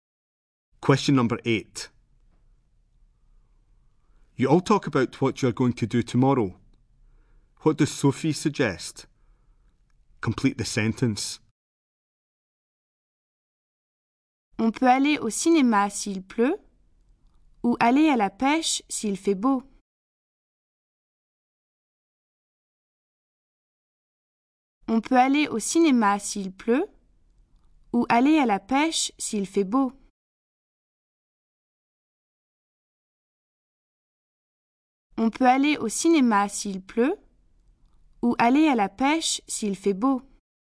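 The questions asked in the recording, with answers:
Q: What does Sophie suggest?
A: Going to the cinema if it rains or going fishing if the weather is nice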